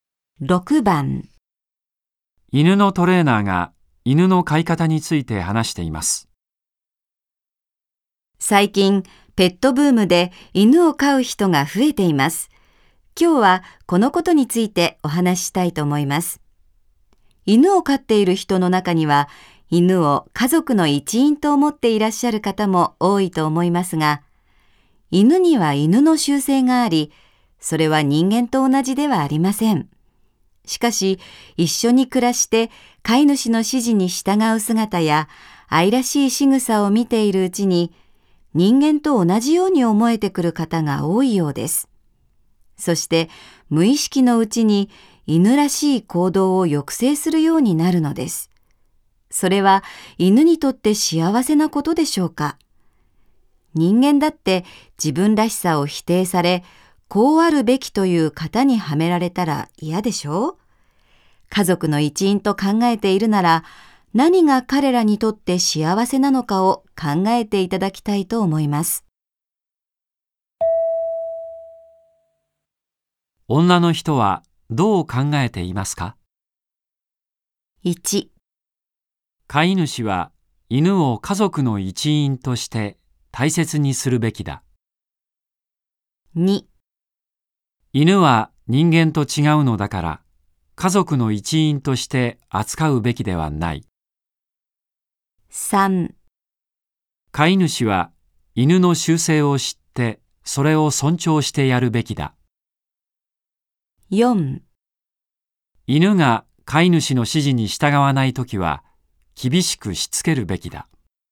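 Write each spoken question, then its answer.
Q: 女の人はどう考えていますか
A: 3: 飼い主は犬の習性を知ってそれを尊重してやるべきだ。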